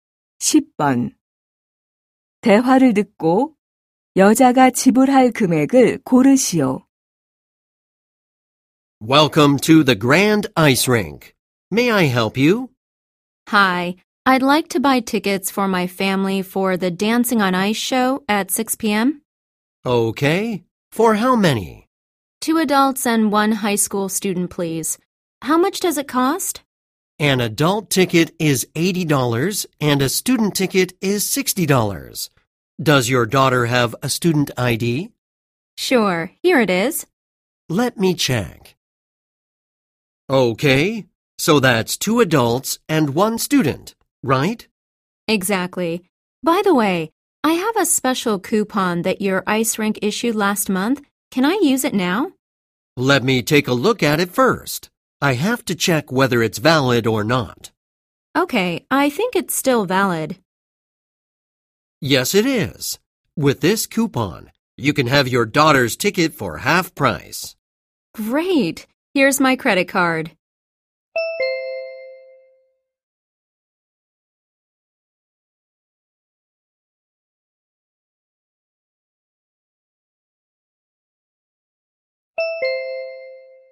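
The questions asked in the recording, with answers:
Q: 대화를 듣고 여자가 지불할 금액을 고르시오.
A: $190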